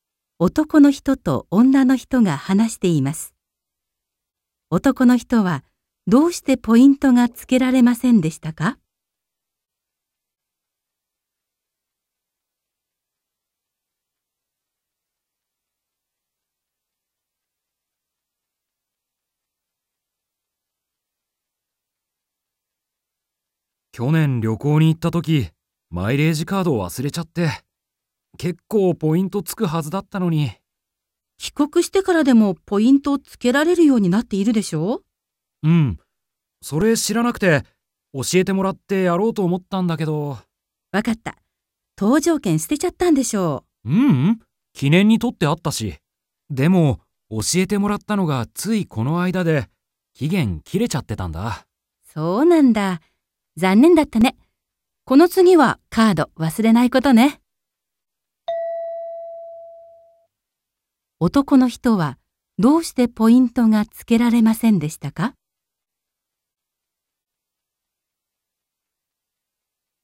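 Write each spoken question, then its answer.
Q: 男の人はどうしてポイントがつけられませんでしたか?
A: 知った時には期限が切れていたから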